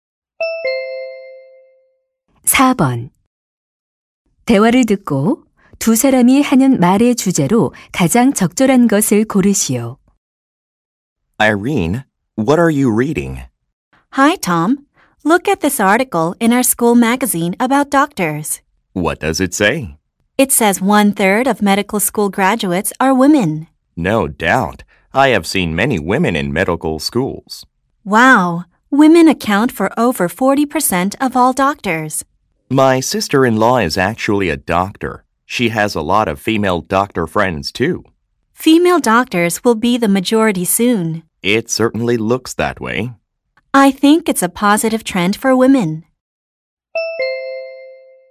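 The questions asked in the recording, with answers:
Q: 대화를 듣고 두 사람이 하는 말의 주제로 가장 적절한 것을 고르시오.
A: 여성 의사의 증가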